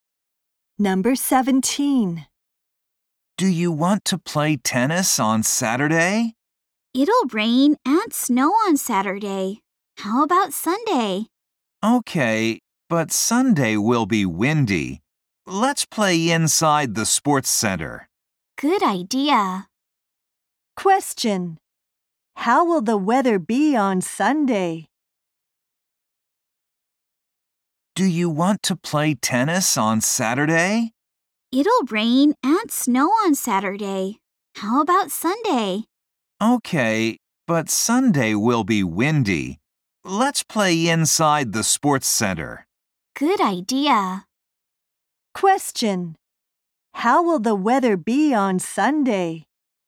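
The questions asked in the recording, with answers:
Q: How will the weather be on Sunday?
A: Windy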